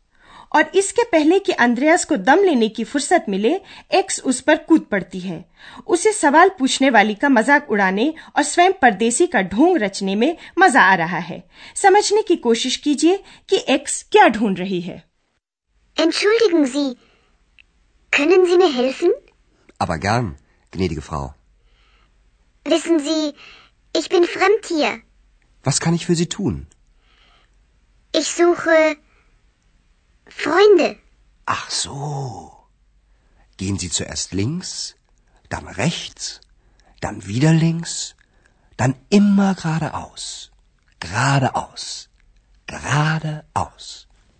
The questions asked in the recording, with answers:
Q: समझने की कोशिश कीजिए कि x क्या ढूंढ रही है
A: x कहती है कि वो दोस्त ढूंढ रही है